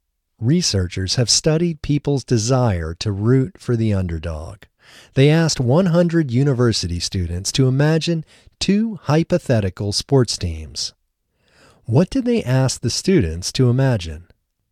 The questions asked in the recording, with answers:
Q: What did they ask the students to imagine?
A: They asked the students to imagine two hypothetical sports teams.